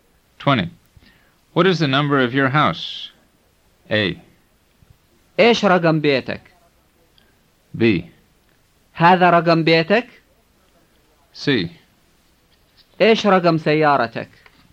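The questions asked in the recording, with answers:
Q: What is the number of your house?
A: A: إيش رقم بيتك؟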